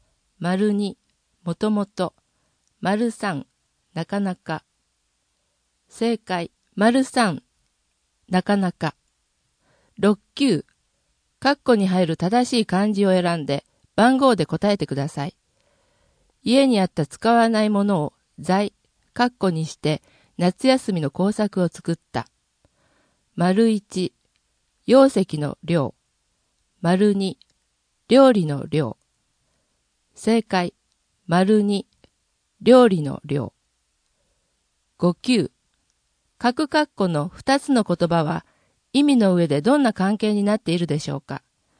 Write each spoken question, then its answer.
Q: 家にあった使わないものを財、括弧にして夏休みの工作を作った。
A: 正解、2、料理の量。